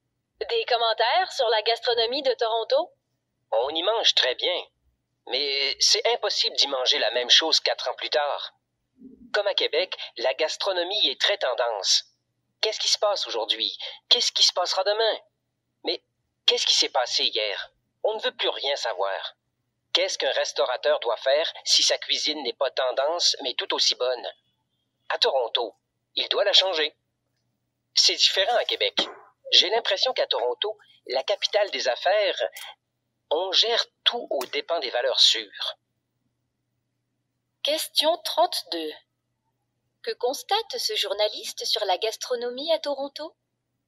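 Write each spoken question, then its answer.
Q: Que constate ce journaliste sur la gastronomie à Toronto?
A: Elle suit les tendances et change sans cesse : on y mange très bien, mais jamais la même chose quelques années plus tard.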